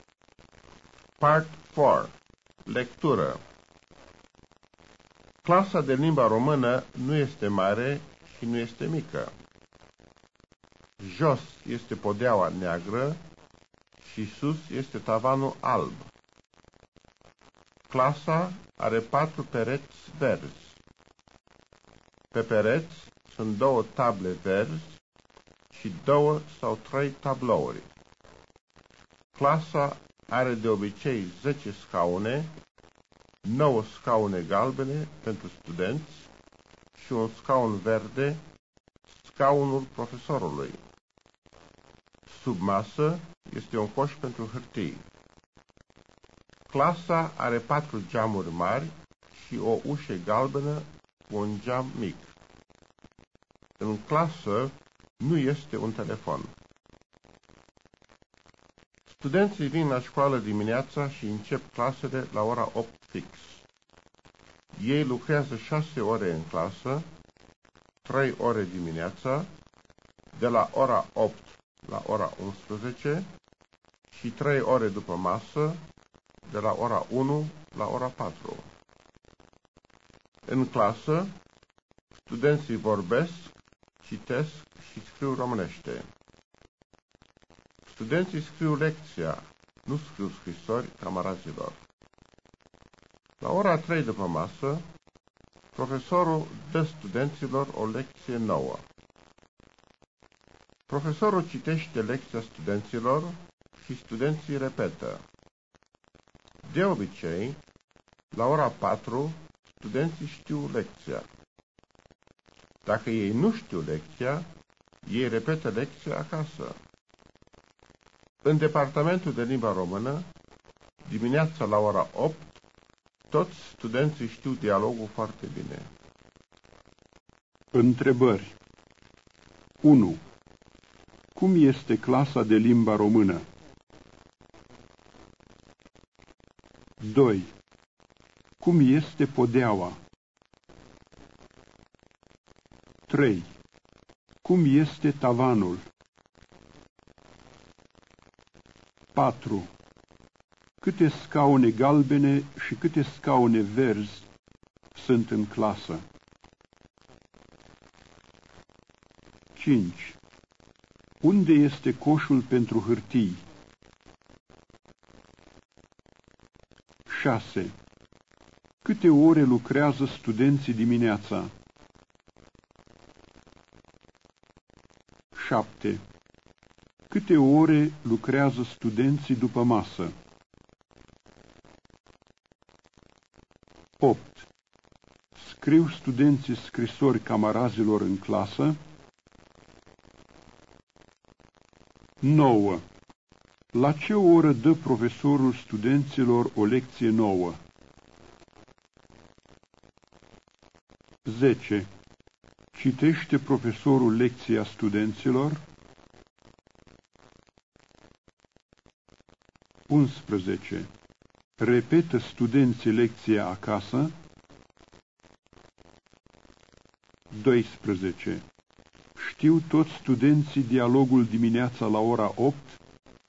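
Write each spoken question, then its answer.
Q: Cum este clasa de limba română?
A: Nu este mare și nu este mică.

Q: Cum este podeaua?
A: Neagră.

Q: Cum este tavanul?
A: Alb.

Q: Câte scaune galbene și câte scaune verzi sunt în clasă?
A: 9 scaune galbene și un scaun verde.

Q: Unde este coșul pentru hârtii?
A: Sub masă.

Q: Câte ore lucrează studenții dimineața?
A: 3 ore.

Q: Câte ore lucrează studenții după masă?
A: 3 ore.

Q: Scriu studenții scrisori camarazilor în clasă?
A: Nu.

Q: La ce oră dă profesorul studenților o lecție nouă?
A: La ora 3 după masă.

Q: Citește profesorul lecția studenților?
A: Da.

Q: Repetă studenții lecția acasă?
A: Da, dacă nu știu lecția.

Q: Știu toți studenții dialogul dimineața la ora 8?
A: Da, foarte bine.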